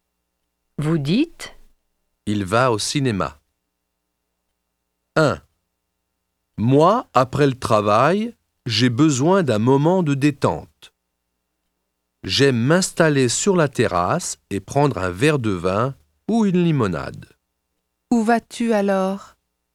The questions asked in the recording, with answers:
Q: Où vas-tu alors?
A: Je vais au café.